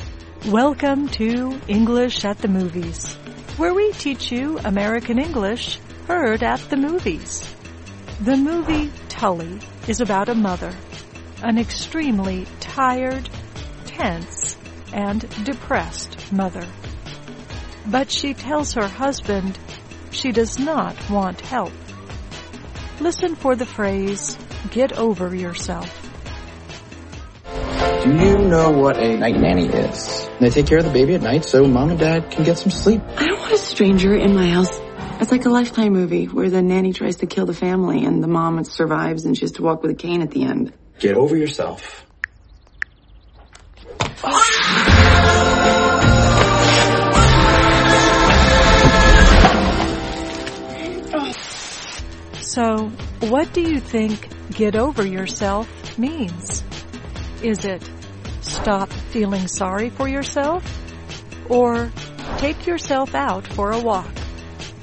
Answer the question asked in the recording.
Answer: Get over yourself means stop feeling sorry for yourself.